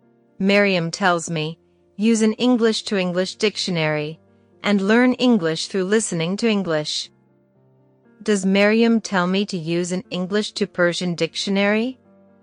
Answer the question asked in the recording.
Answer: No, she doesn't. She tells me to use an English-to-English dictionary.